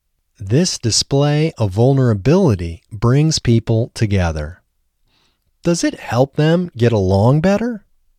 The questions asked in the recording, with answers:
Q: Does it help them get along better?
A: Yes, it helps them get along better.